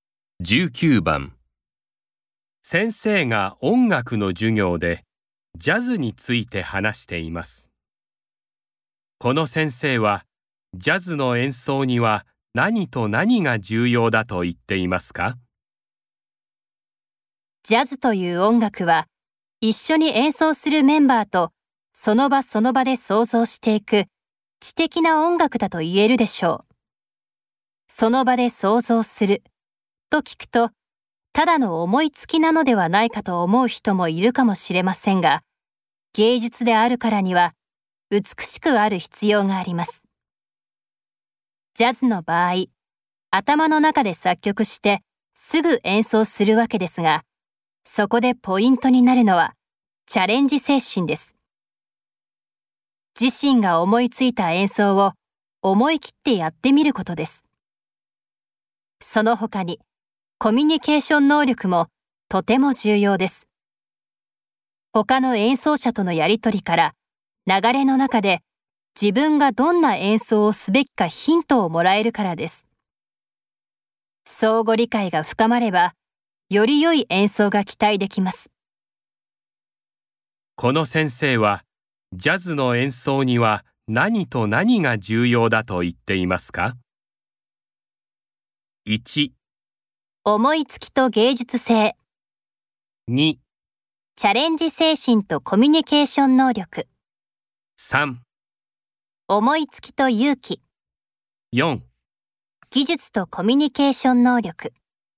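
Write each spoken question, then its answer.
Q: この先生はジャズの演奏には何と何が重要だと言っていますか?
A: 2: チャレンジ精神とコミュニケーション能力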